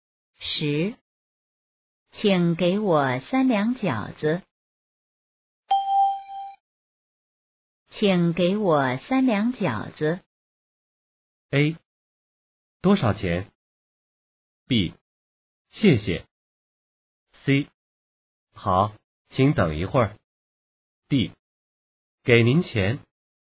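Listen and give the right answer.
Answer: C: 好,请等一会儿。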